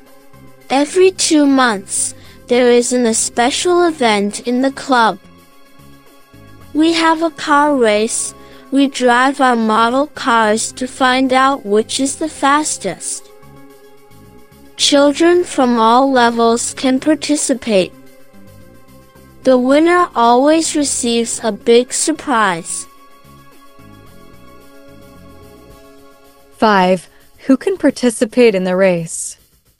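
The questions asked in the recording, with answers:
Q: Who can participate in the race?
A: Children from all levels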